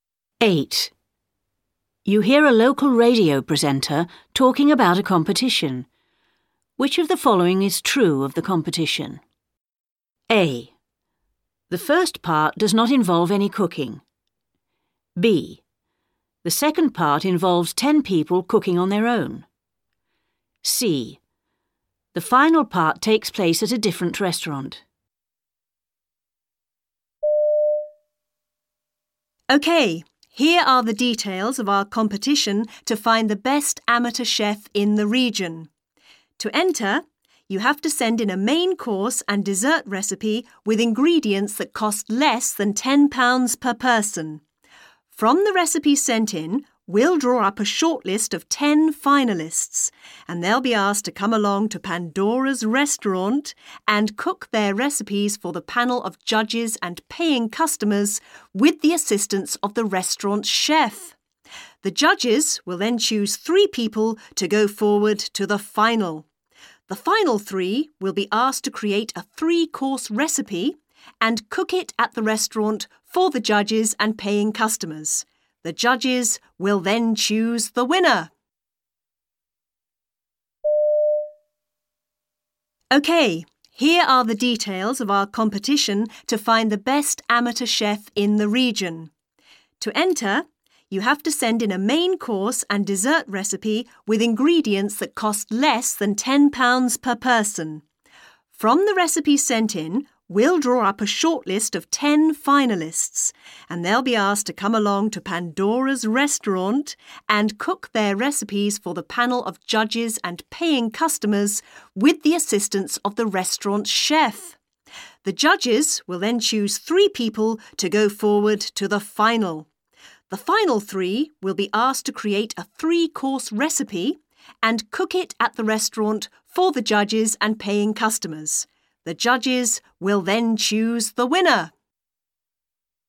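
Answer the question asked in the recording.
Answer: A: The first part does not involve any cooking.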